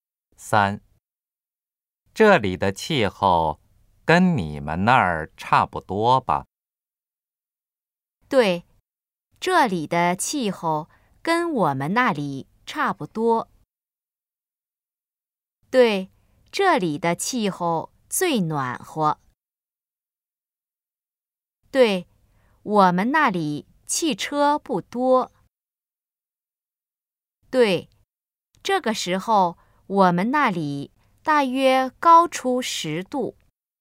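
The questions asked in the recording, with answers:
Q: 这里的气候跟你们那儿差不多吧?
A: 对,这里的气候跟我们那里差不多。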